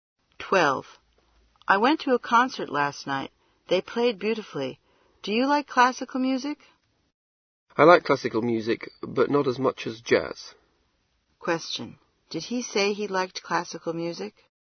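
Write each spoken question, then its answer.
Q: Did he say he liked classical music?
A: Yes, but not as much as jazz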